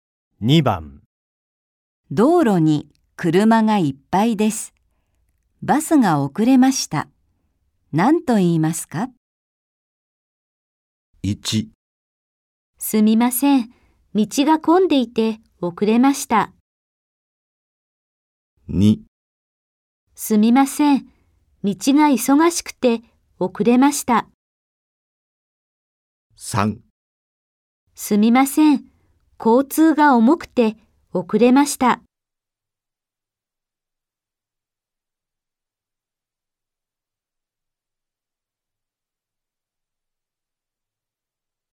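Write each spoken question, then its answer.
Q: 道路に車がいっぱいです。バスが遅れました。何と言いますか?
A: 1: すみません、道が混んでいて遅れました。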